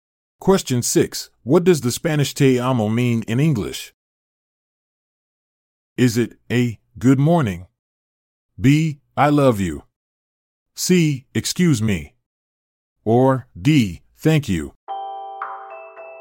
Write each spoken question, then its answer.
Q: What does the Spanish te amo mean in English?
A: The answer is B. I love you.